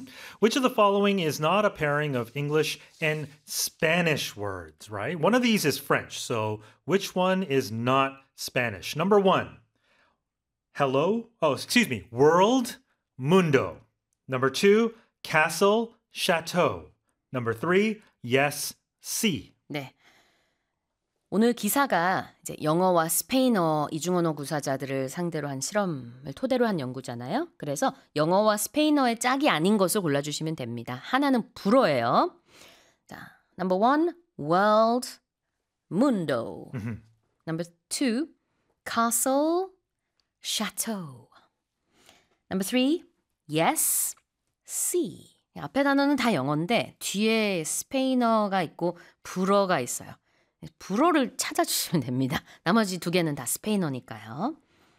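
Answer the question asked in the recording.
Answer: 2: castle, chateau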